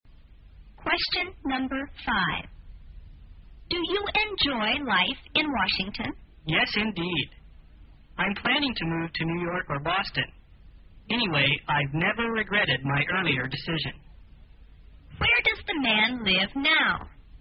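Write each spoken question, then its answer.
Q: Where does the man live now?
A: In Washington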